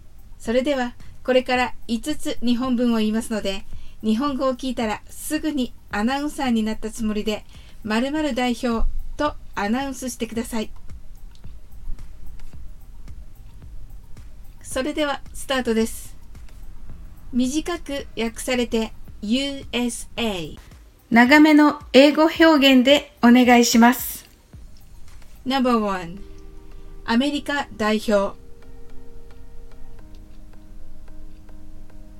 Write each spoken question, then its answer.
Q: アメリカ代表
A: The answer is the representatives of the United States of America